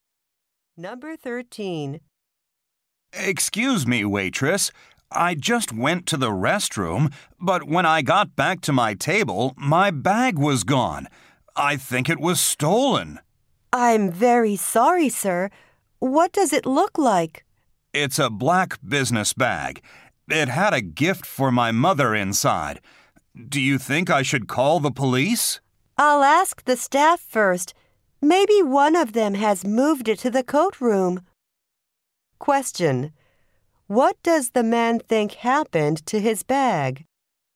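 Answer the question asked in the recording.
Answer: It was stolen.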